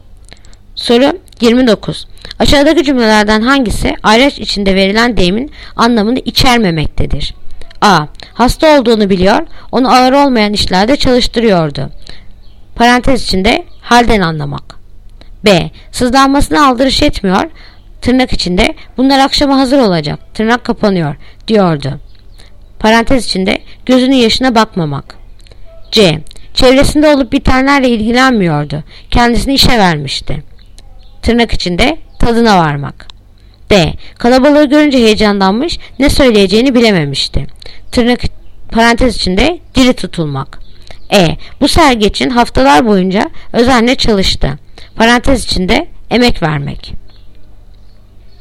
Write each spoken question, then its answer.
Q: Aşağıdaki cümlelerden hangisi ayraç içinde verilen deyimin anlamını içermemektedir?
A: Yanıt Ceyhan. Çevresinde olup bitenlerle ilgilenmiyordu.